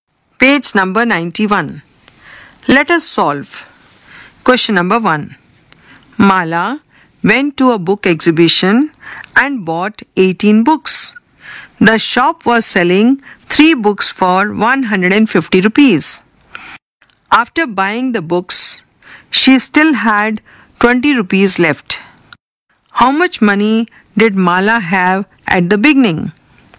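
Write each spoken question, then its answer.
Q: How much money did Mala have at the beginning?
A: 920 rupees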